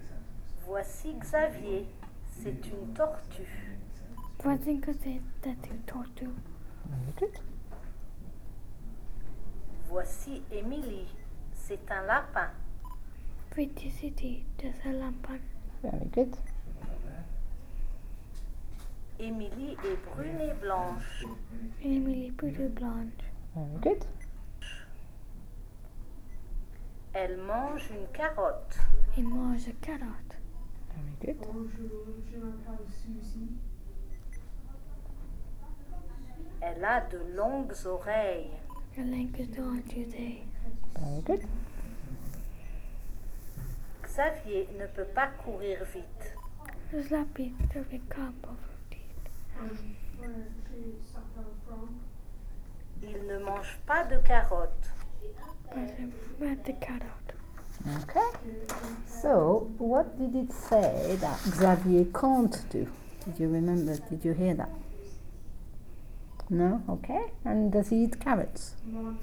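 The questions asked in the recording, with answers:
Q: So, what did it say that Xavier can't do?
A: Run fast

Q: And does he eat carrots?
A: No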